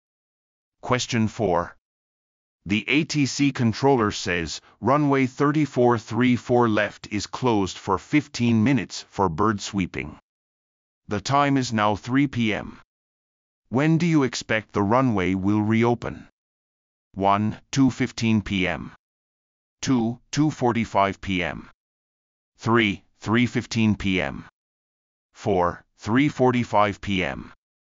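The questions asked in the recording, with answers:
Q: When do you expect the runway will reopen?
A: 3: 3:15 p.m.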